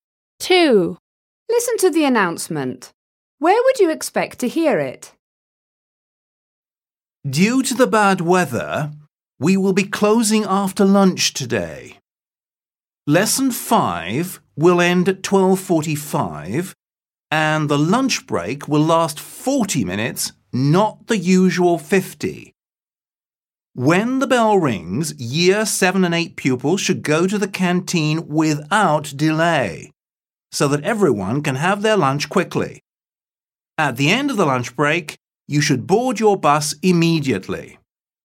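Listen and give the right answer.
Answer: At a school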